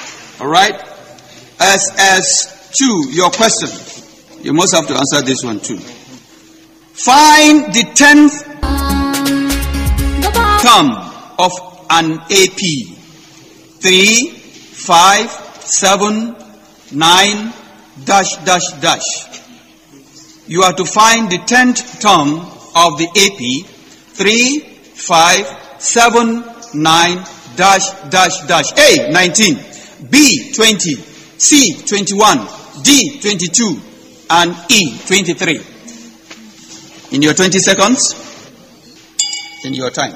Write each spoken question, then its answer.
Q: Find the 10th term of an AP.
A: C, 21.